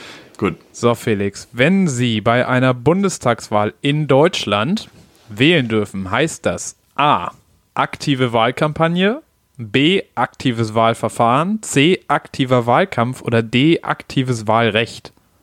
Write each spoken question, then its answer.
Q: So, Felix, wenn Sie bei einer Bundestagswahl in Deutschland wählen dürfen, heißt das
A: Ja, auf jeden Fall D.